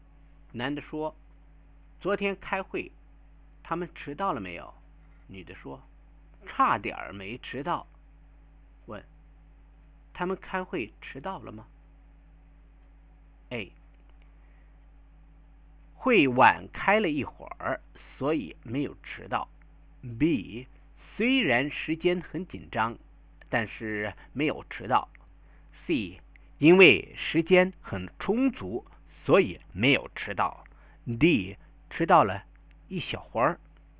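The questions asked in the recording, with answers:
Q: 他们开会迟到了吗?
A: B: 虽然时间很紧张,但是没有迟到。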